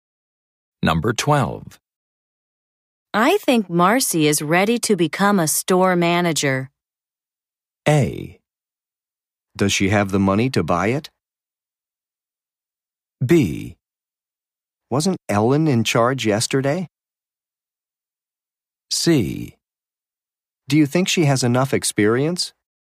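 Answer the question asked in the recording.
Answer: C: Do you think she has enough experience?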